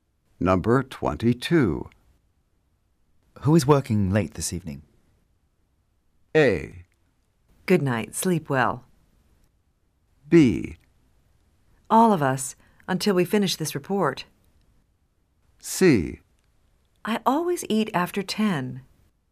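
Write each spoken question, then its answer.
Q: Who is working late this evening?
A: B: All of us, until we finish this report.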